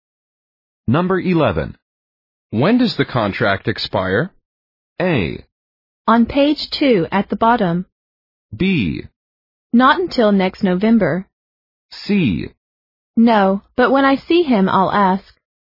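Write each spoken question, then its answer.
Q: When does the contract expire?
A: B: Not until next November.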